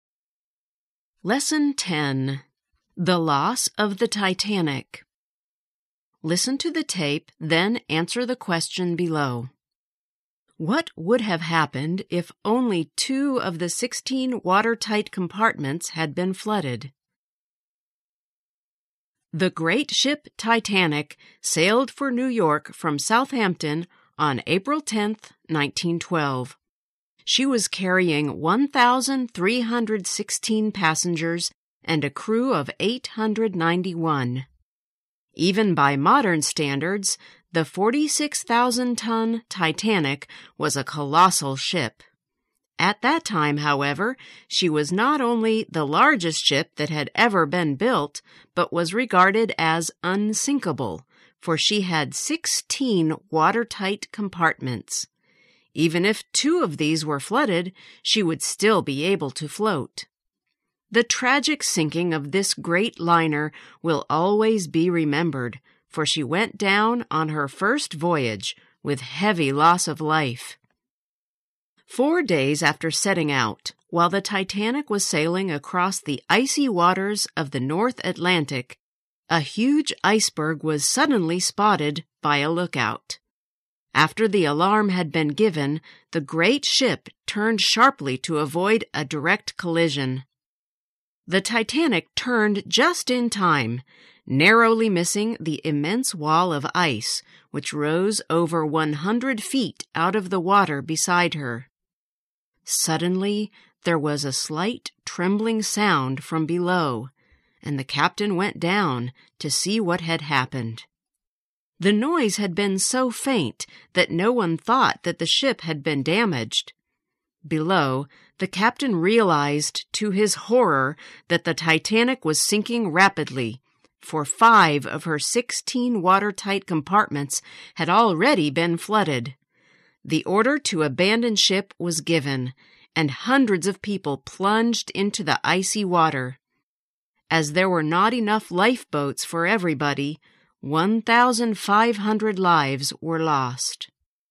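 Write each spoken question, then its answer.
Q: What would have happened if only 2 of the 16 watertight compartments had been flooded?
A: She would still have been able to float.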